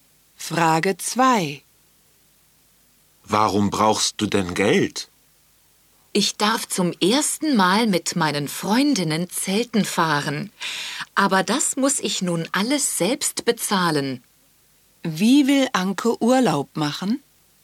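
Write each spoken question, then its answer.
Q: Wie will Anke Urlaub machen?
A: Zelten mit ihren Freundinnen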